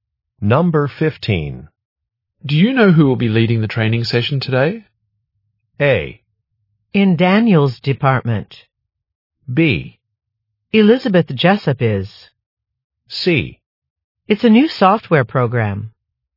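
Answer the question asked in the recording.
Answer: B: Elizabeth Jessup is.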